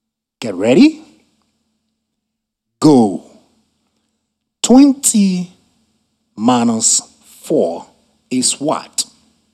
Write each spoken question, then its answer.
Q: 20 minus 4 is what?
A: 16.